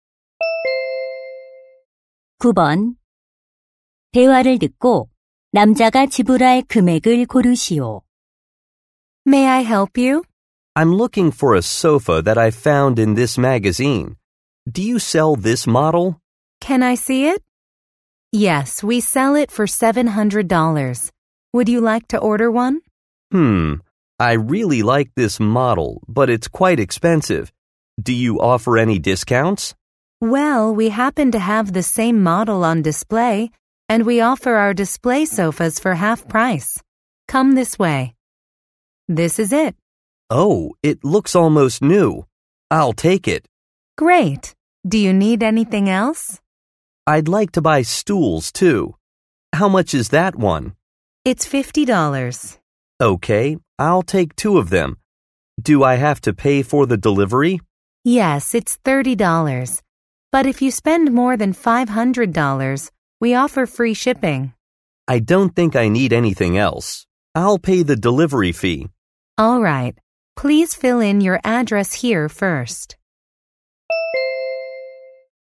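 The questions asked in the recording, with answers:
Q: 대화를 듣고 남자가 지불할 금액을 고르시오.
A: $480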